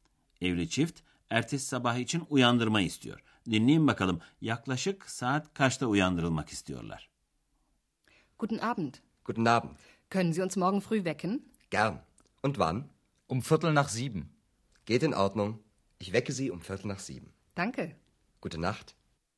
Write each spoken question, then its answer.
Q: Dinleyin bakalım yaklaşık saat kaçta uyandırılmak istiyorlar?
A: Yedi dediyseniz doğru.